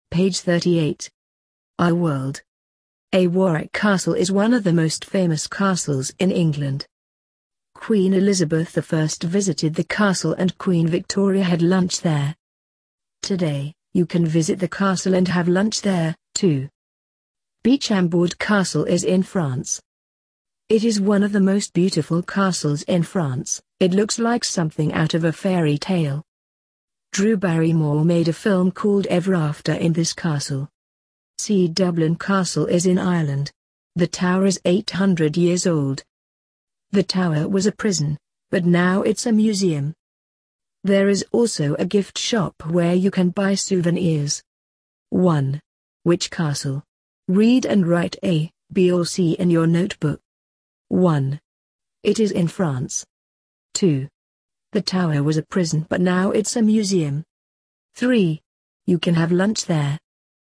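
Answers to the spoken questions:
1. B: Chambord Castle
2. C: Dublin Castle
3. A: Warwick Castle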